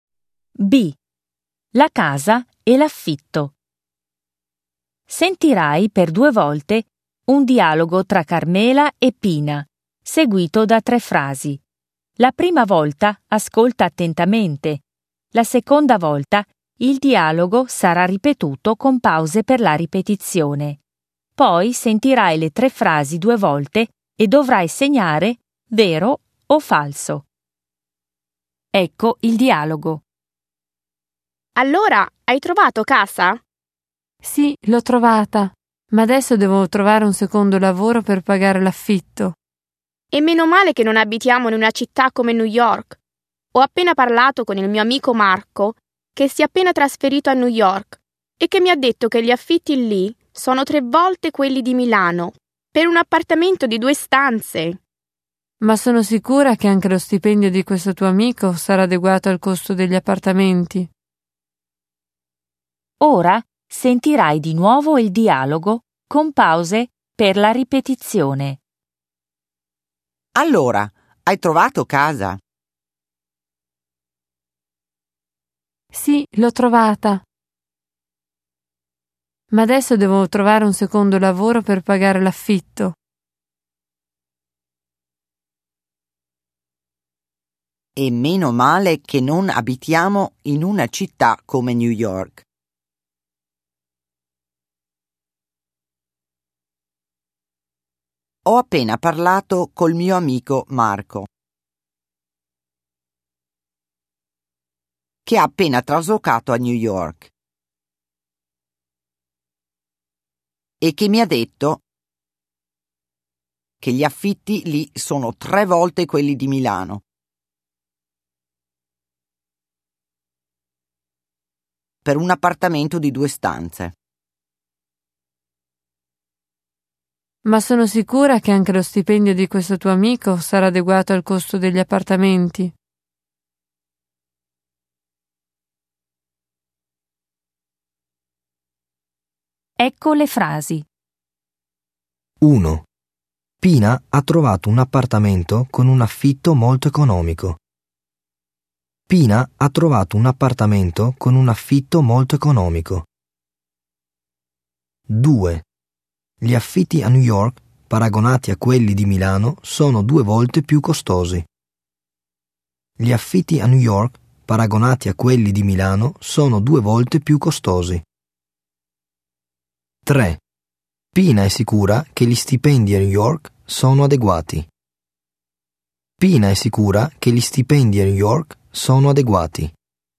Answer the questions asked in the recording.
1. Falso.
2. Falso.
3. Vero.